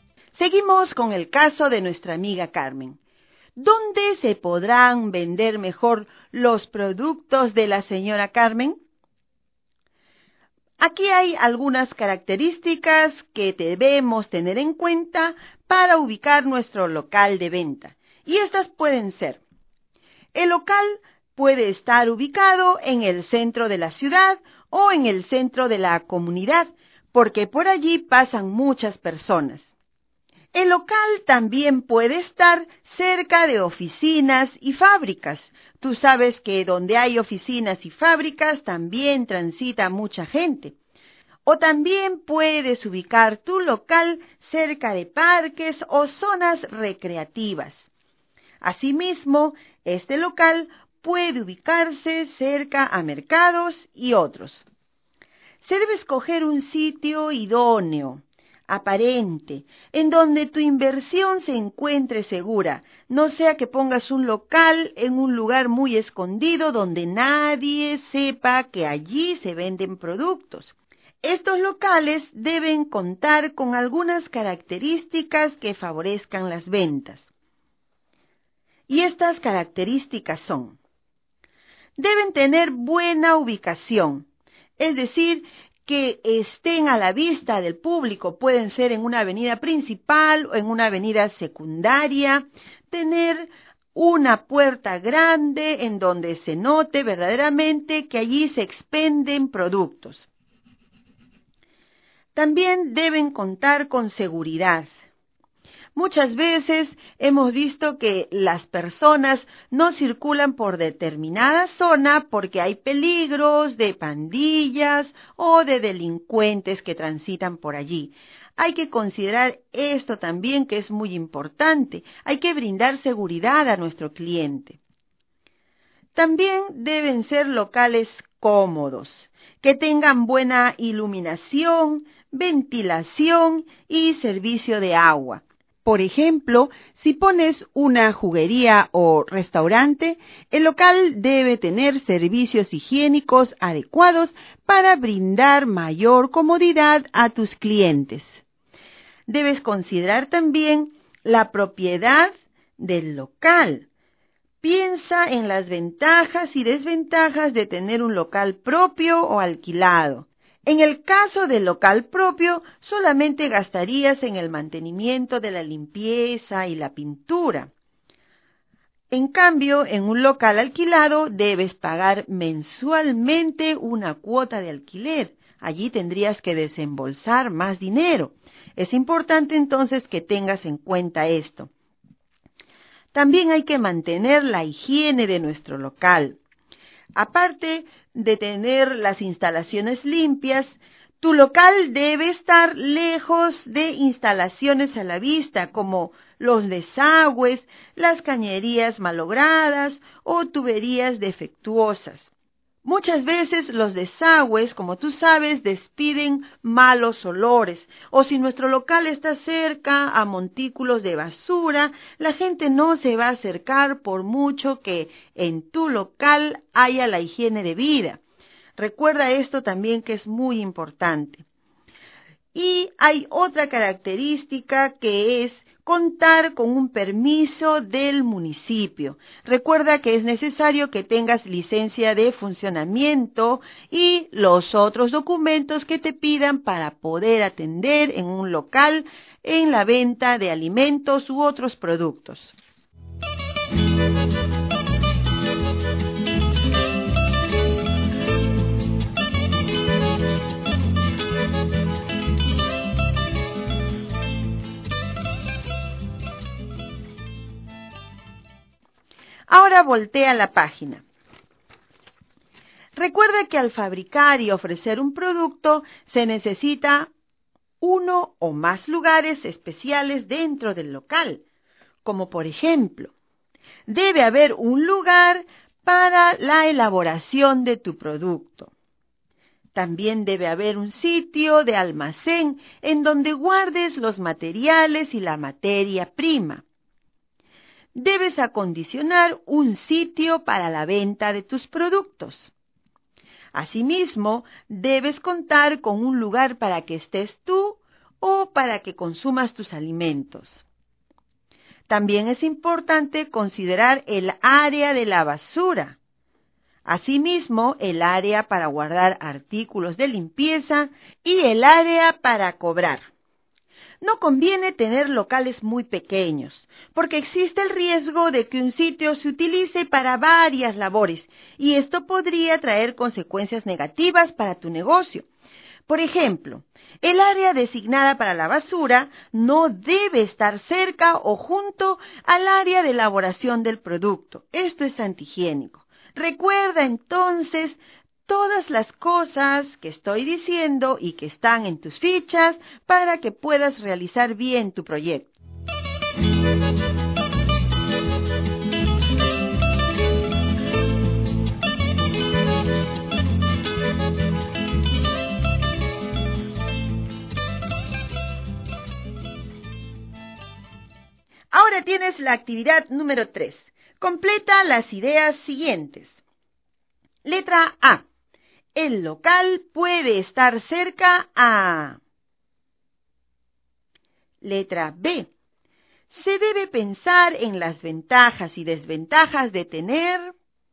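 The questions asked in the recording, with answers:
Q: El local puede estar cerca a...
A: oficinas y fábricas, parques o zonas recreativas, o mercados

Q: Se debe pensar en las ventajas y desventajas de tener...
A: un local propio o alquilado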